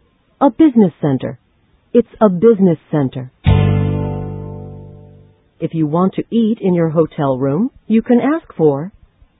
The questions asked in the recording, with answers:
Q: If you want to eat in your hotel room, you can ask for...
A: Room service. You can ask for room service.